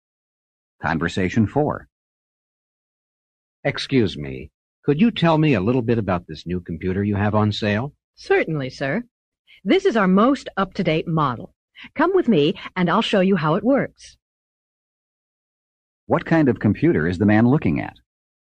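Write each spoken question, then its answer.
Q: What kind of computer is the man looking at?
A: The most up-to-date model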